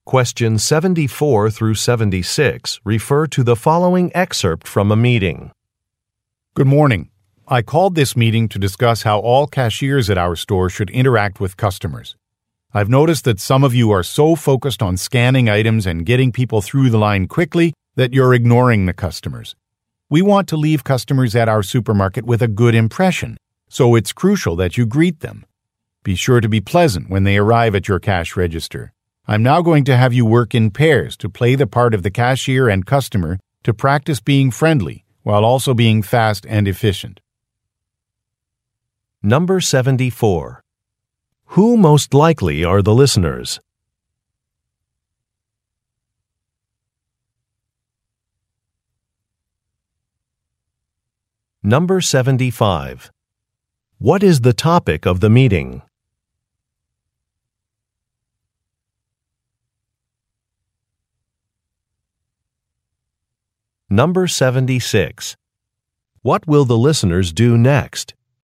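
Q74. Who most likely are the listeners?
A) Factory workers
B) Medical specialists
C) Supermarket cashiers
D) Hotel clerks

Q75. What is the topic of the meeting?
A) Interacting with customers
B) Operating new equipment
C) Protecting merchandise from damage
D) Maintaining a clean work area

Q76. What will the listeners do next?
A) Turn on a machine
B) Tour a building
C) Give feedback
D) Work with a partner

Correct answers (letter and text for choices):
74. C) Supermarket cashiers
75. A) Interacting with customers
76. D) Work with a partner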